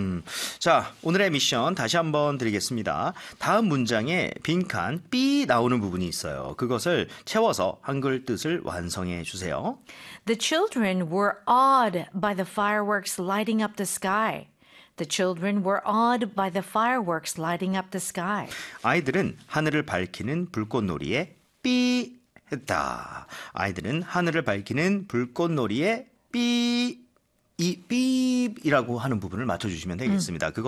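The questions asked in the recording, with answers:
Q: 아이들은 하늘을 밝히는 불꽃놀이에 B 했다.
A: 경탄(감탄)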